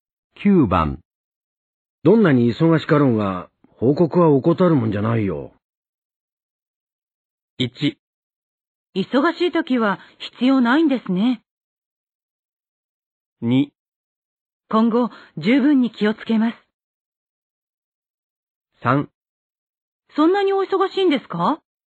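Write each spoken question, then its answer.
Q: どんなに忙しかろうが、報告は怠るもんじゃないよ。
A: 2: 今後、十分に気をつけます。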